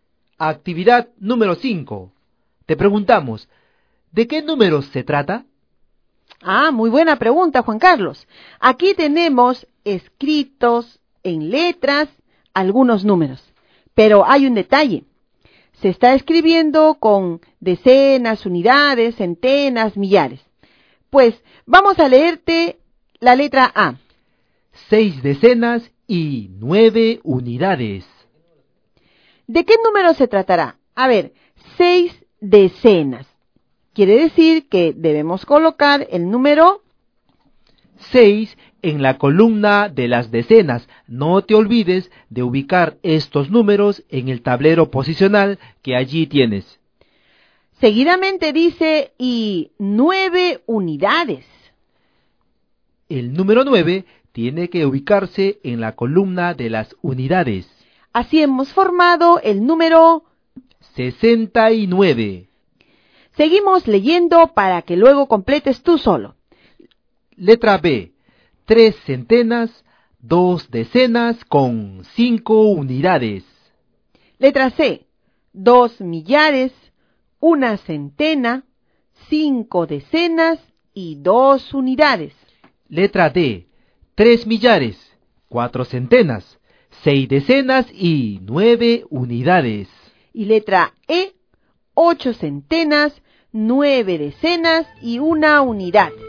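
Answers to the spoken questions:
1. 325
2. 2152
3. 3469
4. 891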